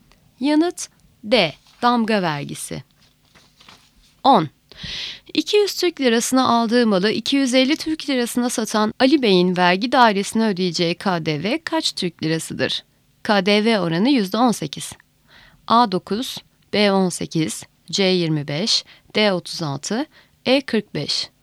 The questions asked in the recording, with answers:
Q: 200 Türk lirasına aldığı malı 250 Türk lirasına satan Ali Bey'in vergi dairesine ödeyeceği KDV kaç Türk lirasıdır?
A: Yanıt A 9.